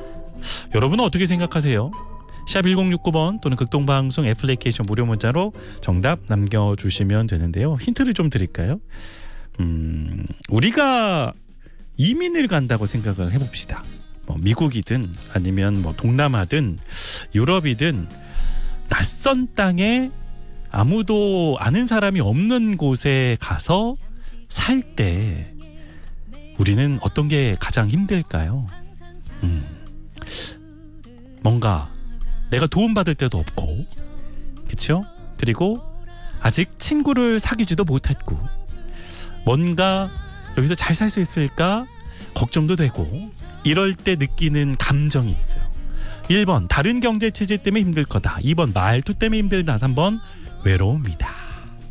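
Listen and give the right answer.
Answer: 3번: 외로움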